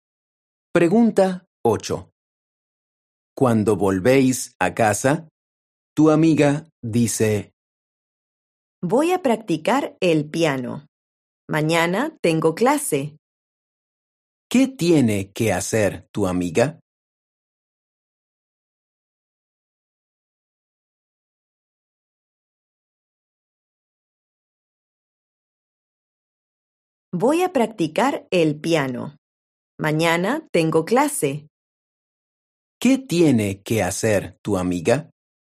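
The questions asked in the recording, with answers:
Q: ¿Qué tiene que hacer tu amiga?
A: practicar el piano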